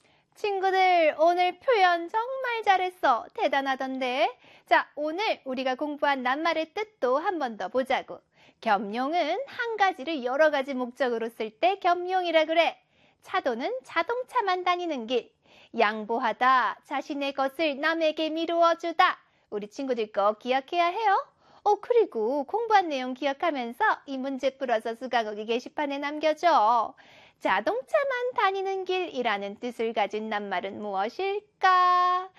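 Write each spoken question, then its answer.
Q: 자동차만 다니는 길이라는 뜻을 가진 낱말은 무엇일까?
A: 차도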